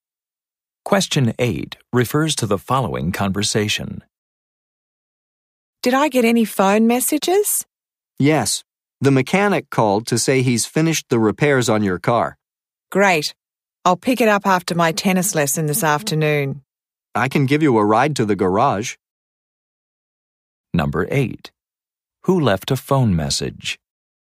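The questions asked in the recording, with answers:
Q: Who left a phone message?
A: The mechanic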